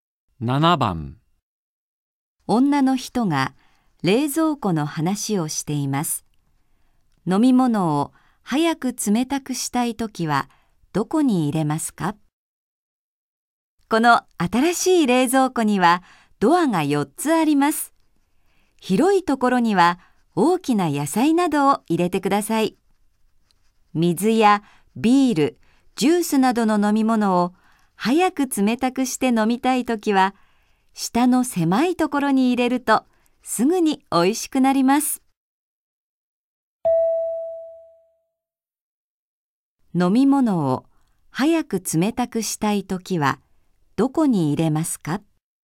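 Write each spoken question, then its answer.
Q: 飲み物を早く冷たくしたいときはどこに入れますか?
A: 下の狭いところ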